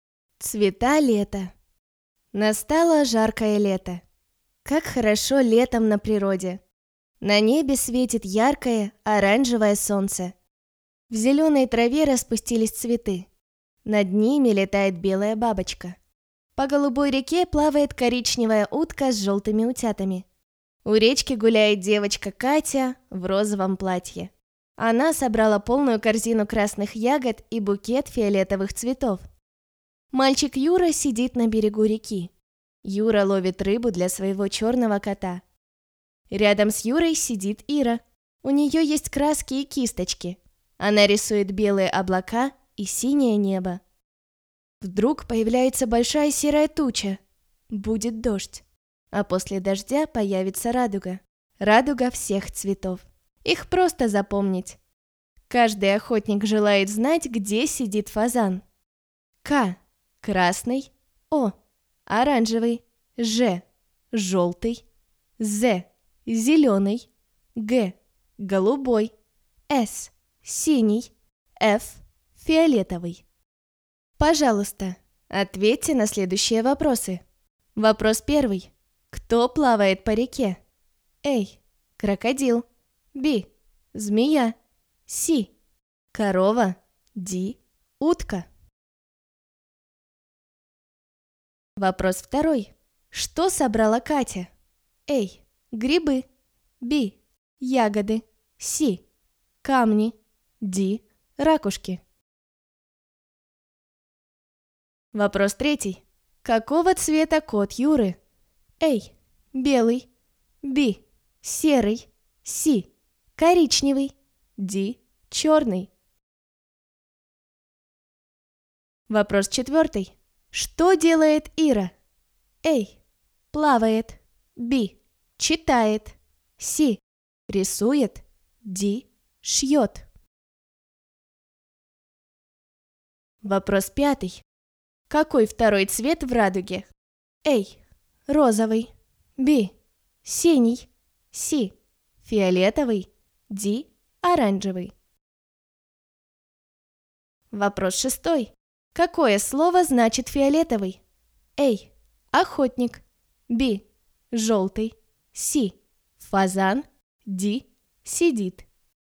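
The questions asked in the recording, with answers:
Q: Кто плавает по реке?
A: Д: Утка

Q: Что собрала Катя?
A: Б: Ягоды

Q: Какого цвета кот Юры?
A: Д: Черный

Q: Что делает Ира?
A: С: Рисует

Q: Какой второй цвет в радуге?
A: Д: Оранжевый

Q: Какое слово значит фиолетовый?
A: С: Фазан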